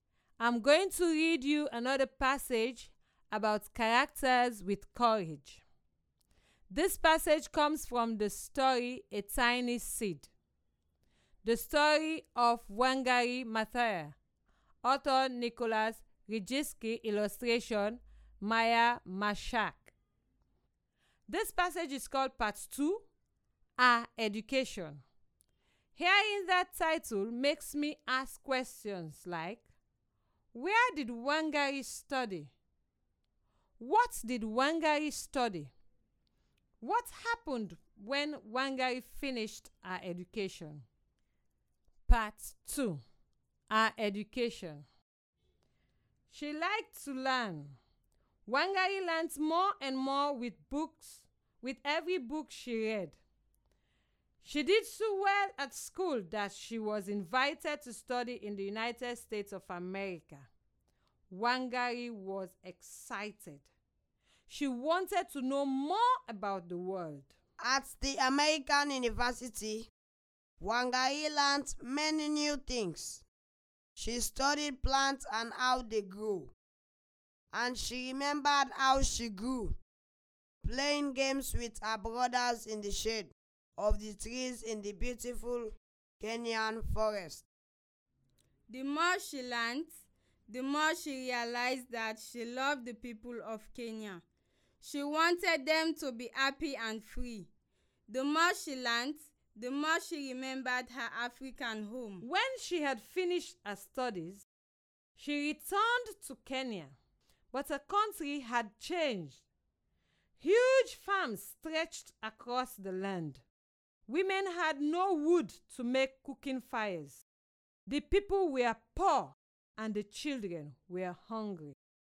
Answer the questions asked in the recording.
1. She went to the United States to attend university there.
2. Yes, Wangari studied plants at university.
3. When she completed her education, she decided to go back to Kenya.